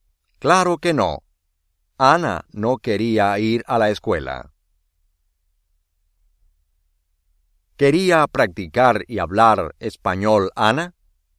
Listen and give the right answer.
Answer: Sí.